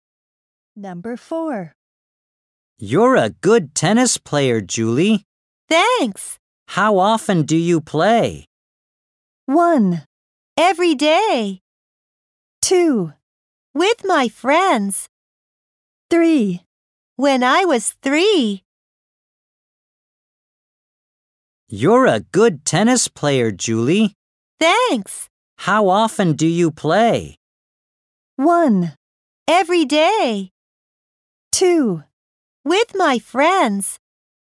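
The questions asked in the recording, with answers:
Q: How often do you play?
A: 1: Every day.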